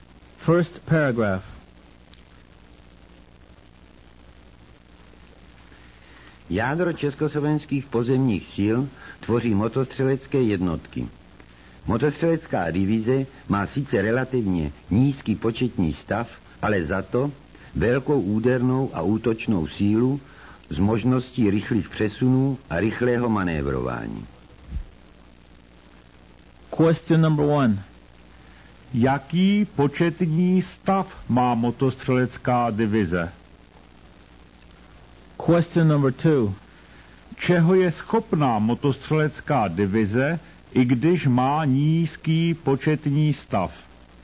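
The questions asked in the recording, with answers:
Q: Jaký početní stav má motostřelecká divize?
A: relativně nízký početní stav

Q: Čeho je schopná motostřelecká divize, i když má nízký početní stav?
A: velké úderné a útočné síly s možností rychlých přesunů a rychlého manévrování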